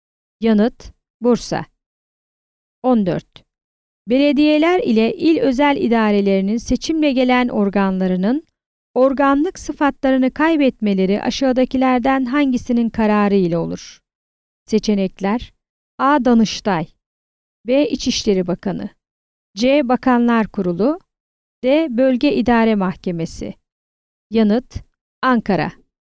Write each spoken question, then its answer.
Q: Belediyeler ile il özel idarelerinin seçimle gelen organlarının organlık sıfatlarını kaybetmeleri aşağıdakilerden hangisinin kararı ile olur?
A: Yanıt: Ankara.